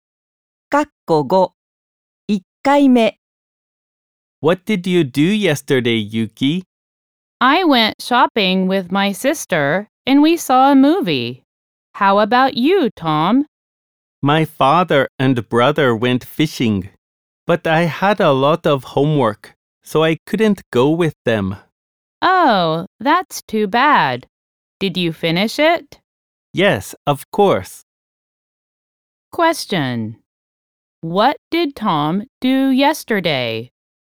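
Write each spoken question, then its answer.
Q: What did Tom do yesterday?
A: He did his homework.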